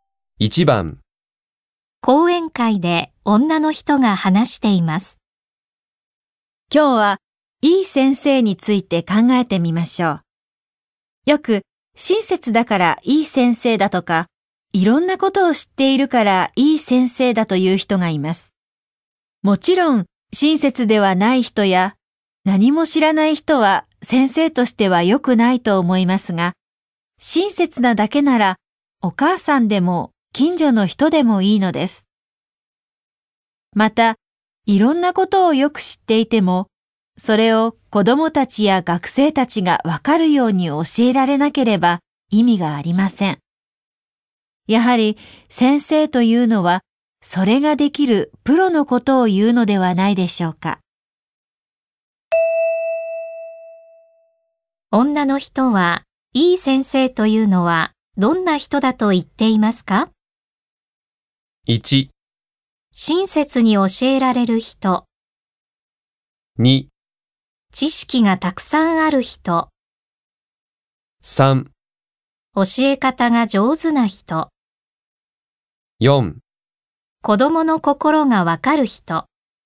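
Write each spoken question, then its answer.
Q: 女の人は、いい先生というのはどんな人だと言っていますか?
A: 3: 教え方が上手な人。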